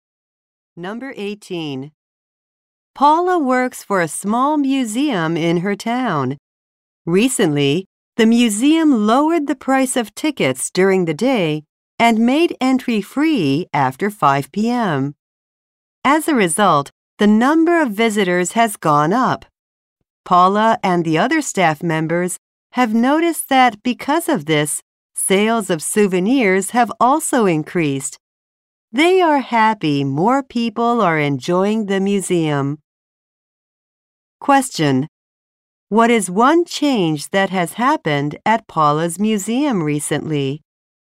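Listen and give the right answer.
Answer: Entry is free after 5 p.m.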